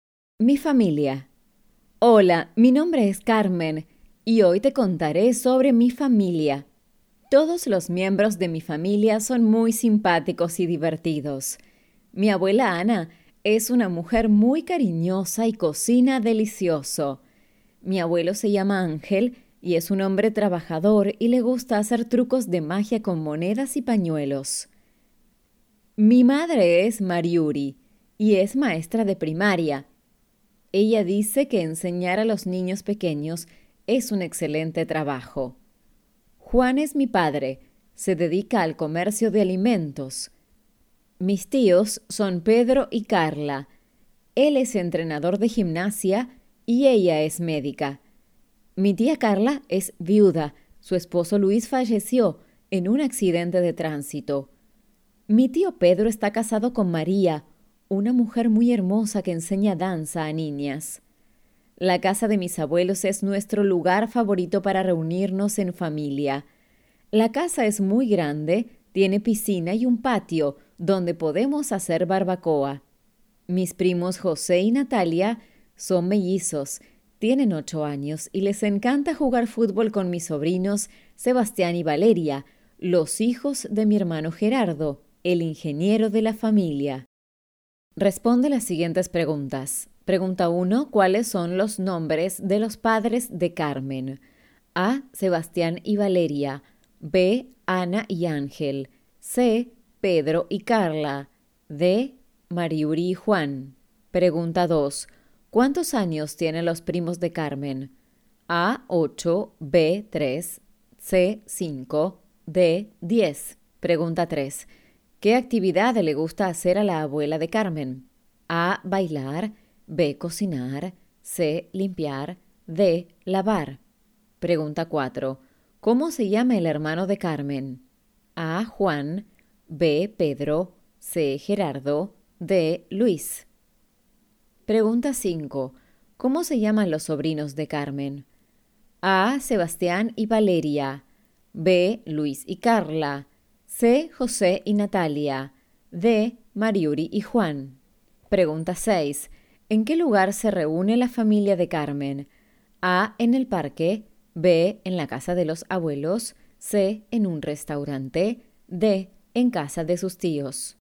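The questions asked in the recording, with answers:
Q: ¿Cuáles son los nombres de los padres de Carmen?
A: D: Mariuri y Juan

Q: ¿Cuántos años tienen los primos de Carmen?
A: A: 8

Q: ¿Qué actividad le gusta hacer a la abuela de Carmen?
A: B: Cocinar

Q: ¿Cómo se llama el hermano de Carmen?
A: C: Gerardo

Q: ¿Cómo se llaman los sobrinos de Carmen?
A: A: Sebastián y Valeria

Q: ¿En qué lugar se reúne la familia de Carmen?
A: B: En la casa de los abuelos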